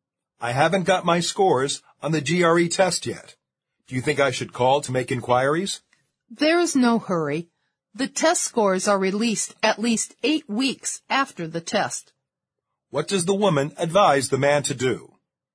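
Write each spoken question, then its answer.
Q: What does the woman advise the man to do?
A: Wait; there is no need to call, since scores come out at least 8 weeks after the test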